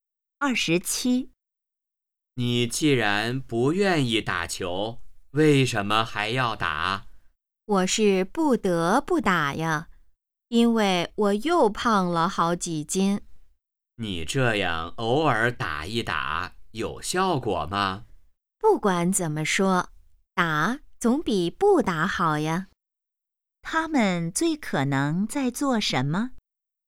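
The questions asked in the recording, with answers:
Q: 他们最可能在做什么?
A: 打球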